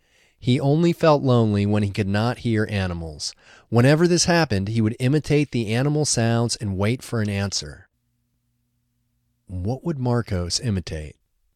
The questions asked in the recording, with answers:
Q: What would Marcos imitate?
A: Marcos would imitate the animal sounds.